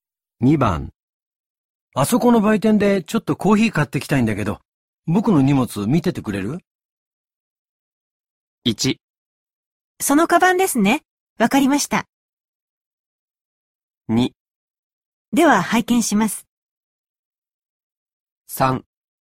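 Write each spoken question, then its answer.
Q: あそこの売店でちょっとコーヒー買ってきたいんだけど、僕の荷物見ててくれる?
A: 1: そのカバンですね、わかりました。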